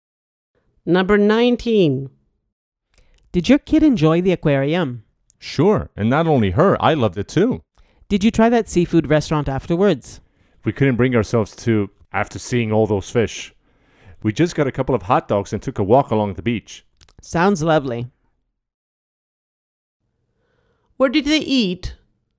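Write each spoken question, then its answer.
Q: Where did they eat?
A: They got hot dogs and walked along the beach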